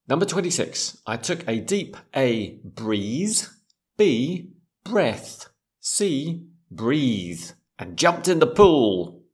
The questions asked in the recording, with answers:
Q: I took a deep A, breeze.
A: That's B. I took a deep breath and jumped in the pool.